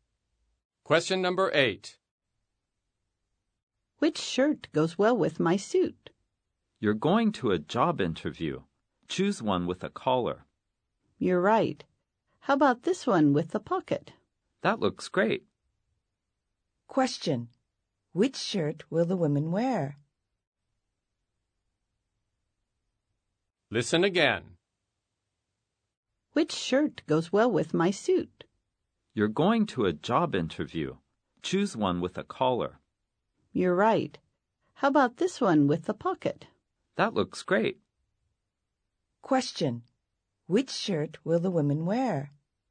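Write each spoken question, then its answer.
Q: Which shirt will the women wear?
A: A shirt with a collar and a pocket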